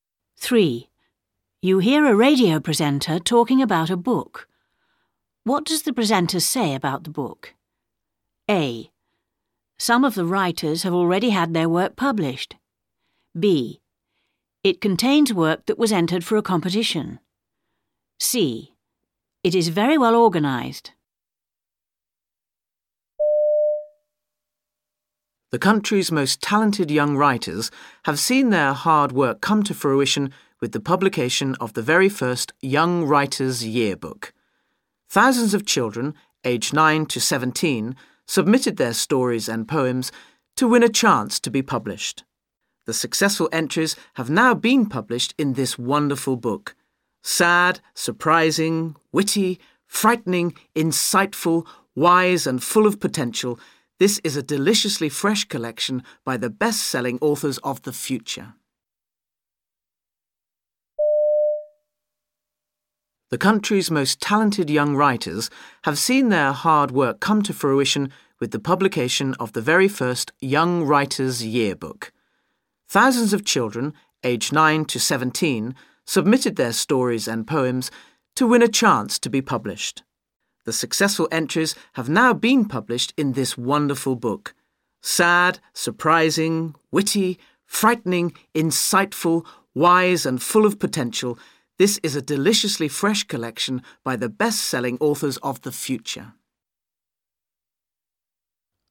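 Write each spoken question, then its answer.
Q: What does the presenter say about the book?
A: B: It contains work that was entered for a competition.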